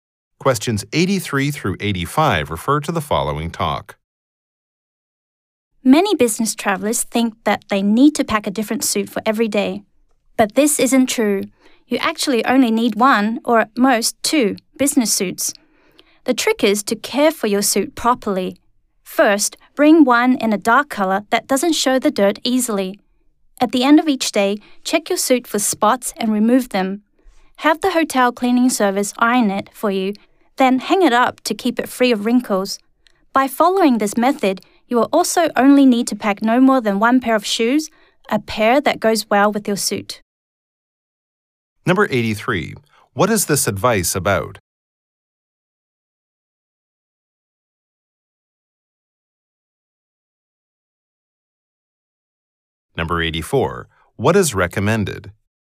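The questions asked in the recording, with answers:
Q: What is this advice about?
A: Packing suits for business travel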